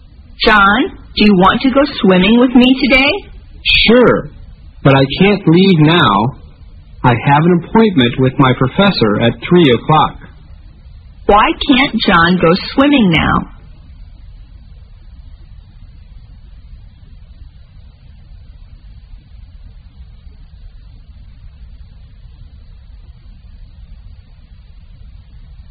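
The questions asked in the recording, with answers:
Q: Why can't John go swimming now?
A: He has an appointment with his professor at 3 o'clock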